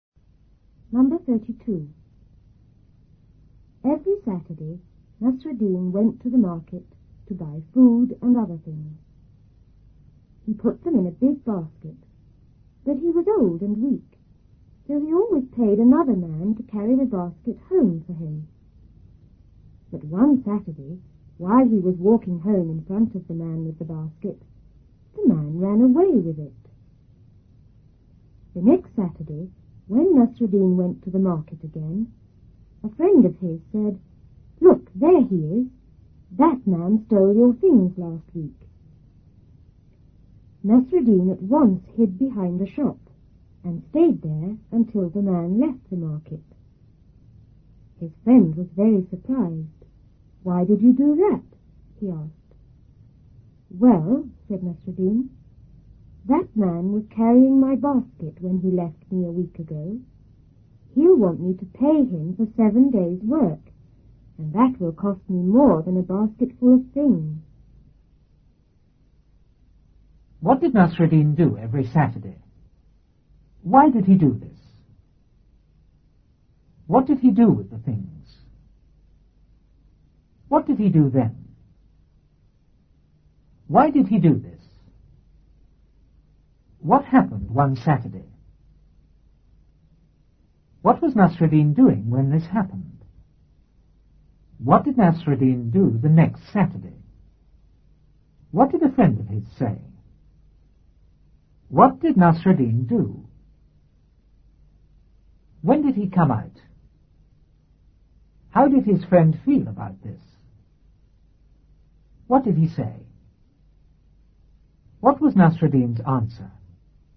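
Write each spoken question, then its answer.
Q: What did Nasruddin do every Saturday?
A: He went to the market to buy food and other things.

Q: What happened one Saturday?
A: The man carrying his basket ran away with it.

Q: What was Nasruddin doing when this happened?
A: Walking home in front of the man with the basket.

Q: What did a friend of his say?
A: "Look, there he is. That man stole your things last week."

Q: What did Nasruddin do?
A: He hid behind a shop.

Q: When did he come out?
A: When the man left the market.

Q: How did his friend feel about this?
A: Very surprised.

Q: What was Nasruddin's answer?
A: The man would want to be paid for 7 days' work, which would cost more than a basket full of things.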